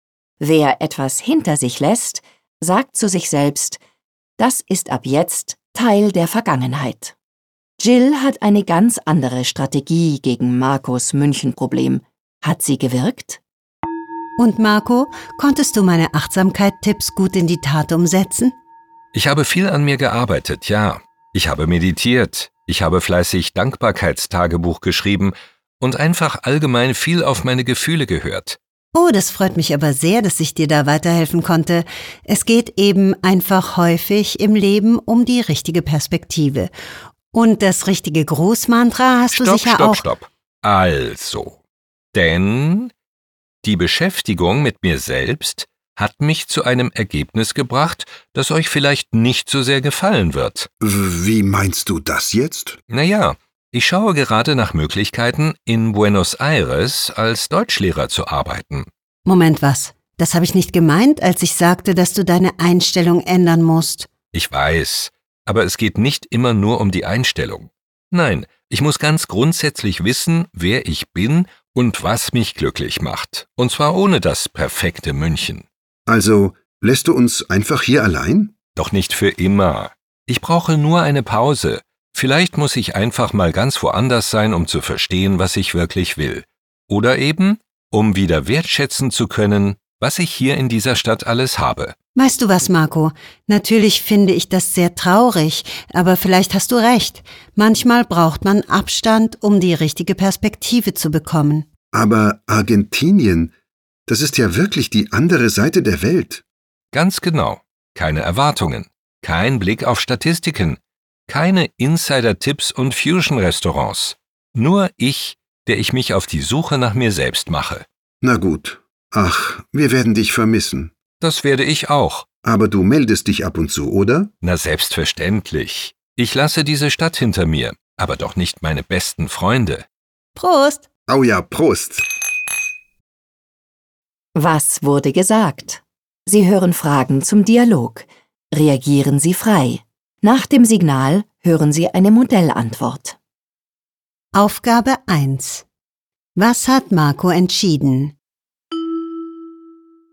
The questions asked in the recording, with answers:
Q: Was hat Marco entschieden?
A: Marco wird für eine Zeit lang nach Argentinien gehen.